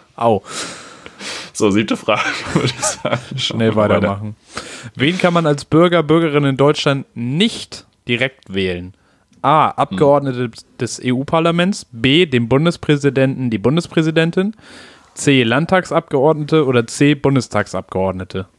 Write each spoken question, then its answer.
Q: Wen kann man als Bürger, Bürgerin in Deutschland nicht direkt wählen?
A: B, dem Bundespräsidenten.